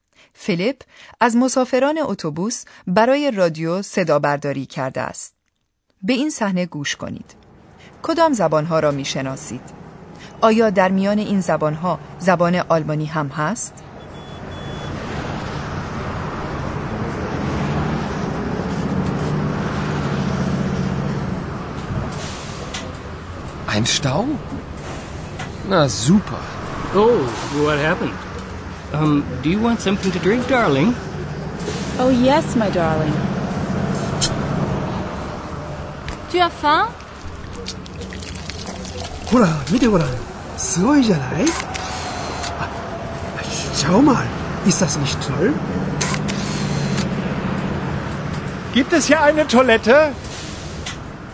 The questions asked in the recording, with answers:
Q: کدام زبانها را می شناسید؟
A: آیا توانستید زبانهای فرانسه و انگلیسی را تشخیص دهید؟ زبان ژاپنی را چطور؟

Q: آیا در میان این زبانها زبان آلمانی هم هست؟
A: شاید صحبت آلمانی زبانها را فهمیده باشید یکی میپرسد که آیا آنجا توالت هم وجود دارد؟